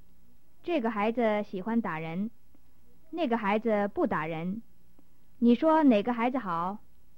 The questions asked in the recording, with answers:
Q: 你说哪个孩子好?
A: 那个孩子好。